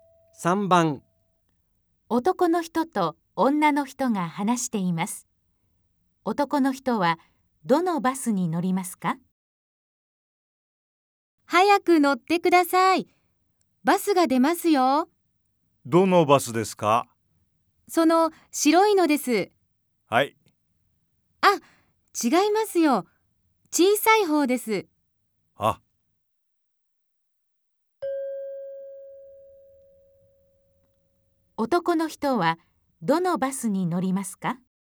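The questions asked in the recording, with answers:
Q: 男の人はどのバスに乗りますか?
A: 小さい白いバス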